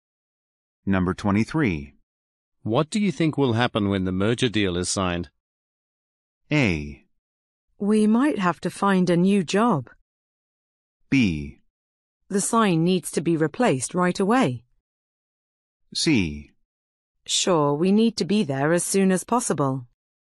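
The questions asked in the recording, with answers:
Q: What do you think will happen when the merger deal is signed?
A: A: We might have to find a new job.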